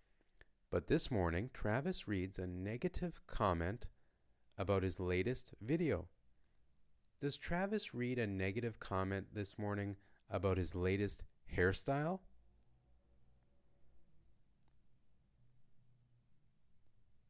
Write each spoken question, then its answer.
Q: Does Travis read a negative comment this morning about his latest hairstyle?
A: No, Travis doesn't read a negative comment this morning about his latest hairstyle.